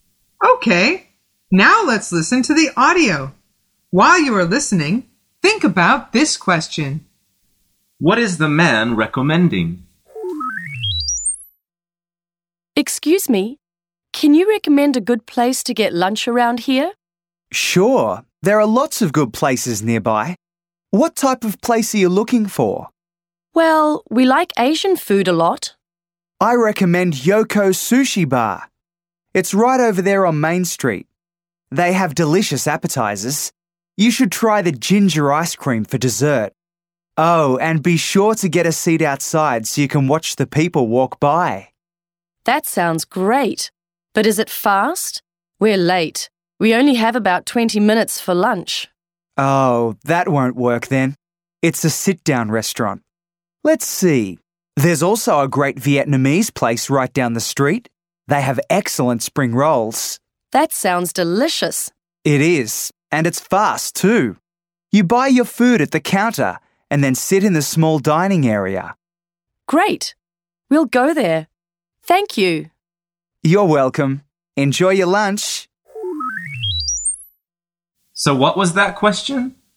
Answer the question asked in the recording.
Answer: The answer is restaurants.